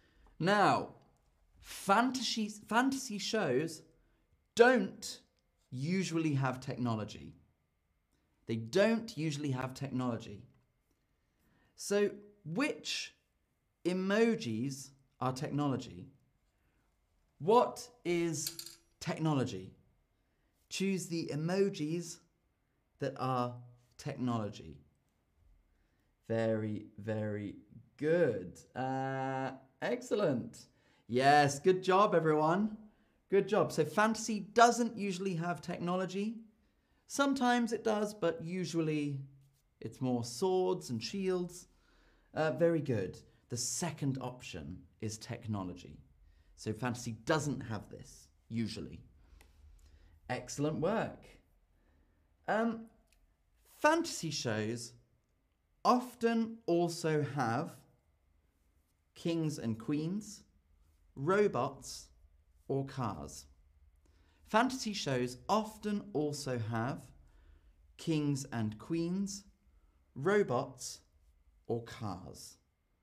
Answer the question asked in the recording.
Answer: Yes, well done. Usually kings and queens.